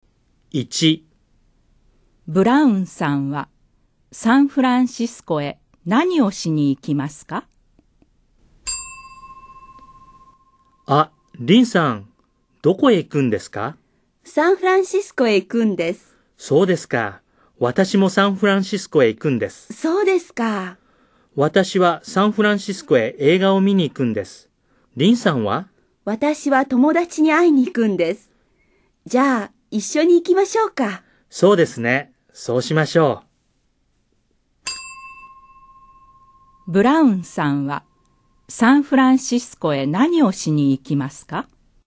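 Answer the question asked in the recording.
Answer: 映画を見に行きます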